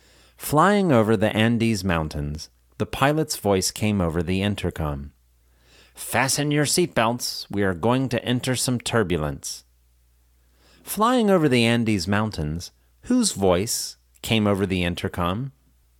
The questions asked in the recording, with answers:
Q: Flying over the Andes Mountains, whose voice came over the intercom?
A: Flying over the Andes Mountains, the pilot's voice came over the intercom.